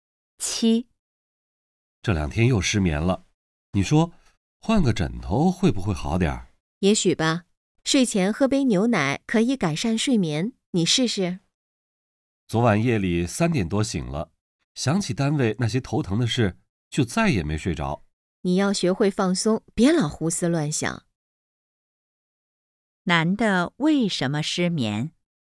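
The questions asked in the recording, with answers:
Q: 男的为什么失眠?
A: 想起单位头疼的事(工作烦心)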